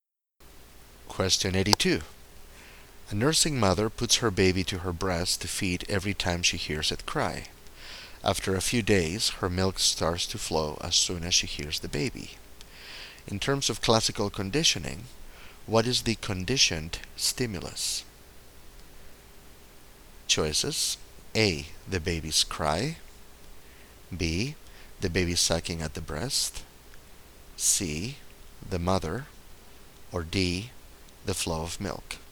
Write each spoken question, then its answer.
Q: In terms of classical conditioning, what is the conditioned stimulus?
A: So the correct answer is A.